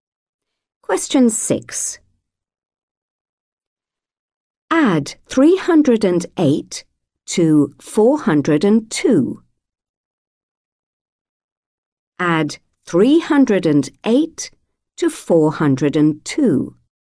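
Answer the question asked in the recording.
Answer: 710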